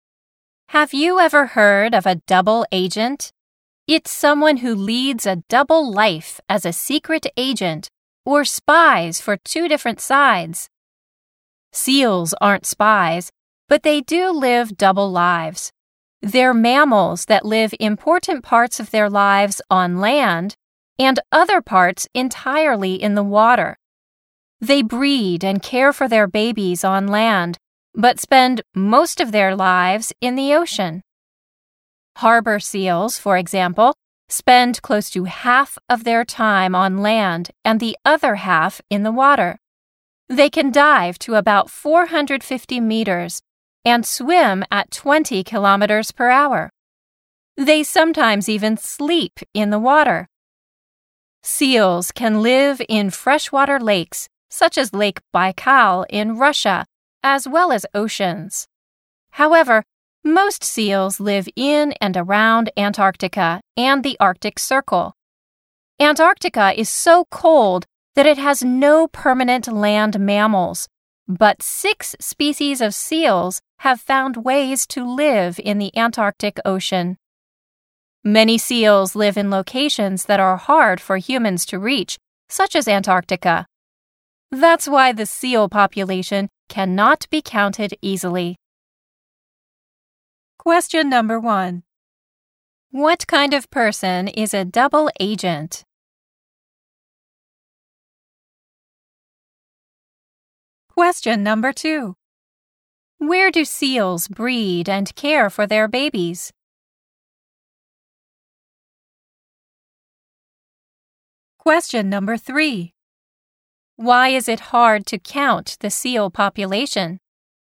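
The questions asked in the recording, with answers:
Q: What kind of person is a double agent?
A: Someone who leads a double life as a secret agent or spies for two different sides.

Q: Where do seals breed and care for their babies?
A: On land.

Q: Why is it hard to count the seal population?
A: Because many seals live in places that are hard for humans to reach, such as Antarctica.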